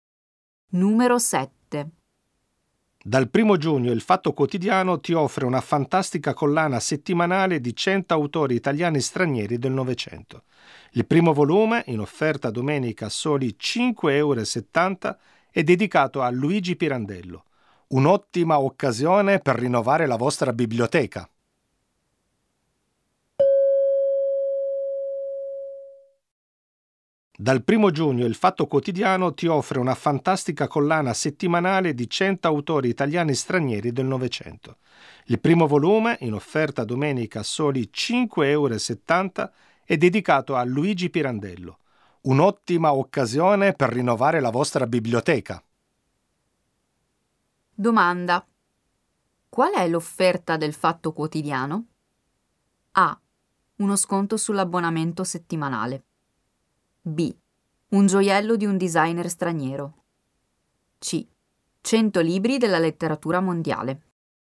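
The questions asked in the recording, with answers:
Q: Qual è l'offerta del Fatto Quotidiano?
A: C: 100 libri della letteratura mondiale.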